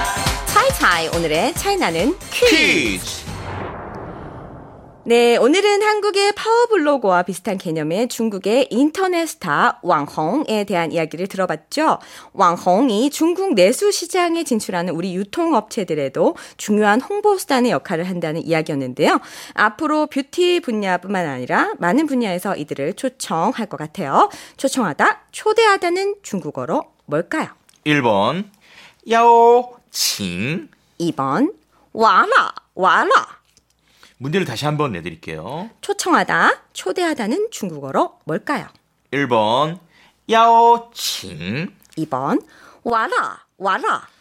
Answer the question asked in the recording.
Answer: 네, 정답은 1번 야오칭.